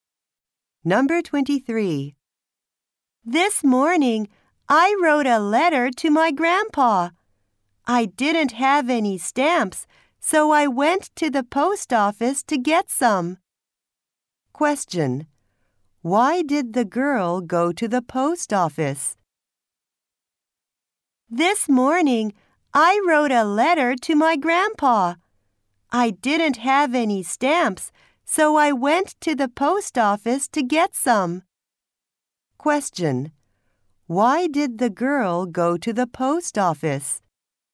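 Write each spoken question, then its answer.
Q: Why did the girl go to the post office?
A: To get some stamps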